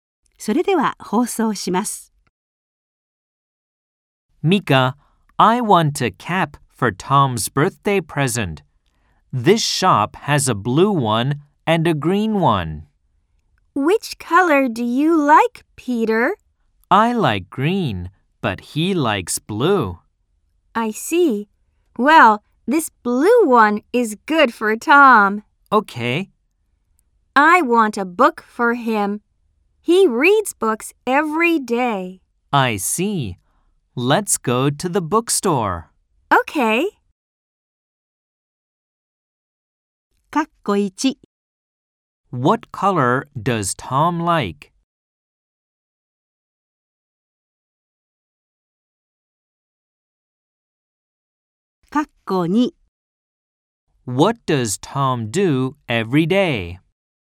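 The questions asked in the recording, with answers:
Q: What color does Tom like?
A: Blue

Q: What does Tom do every day?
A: He reads books.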